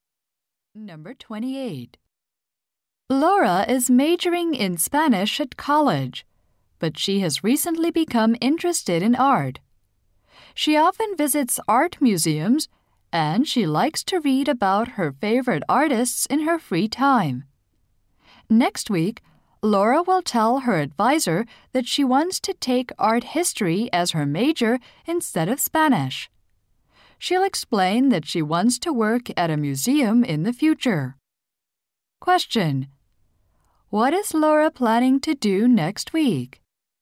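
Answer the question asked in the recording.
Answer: Tell her advisor she wants to change her major to art history.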